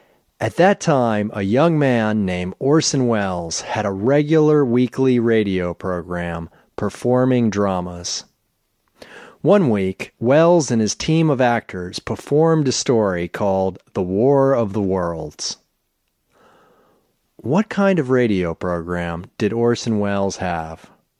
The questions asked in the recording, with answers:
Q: What kind of radio program did Orson Welles have?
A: Orson Welles had a regular weekly radio program performing dramas.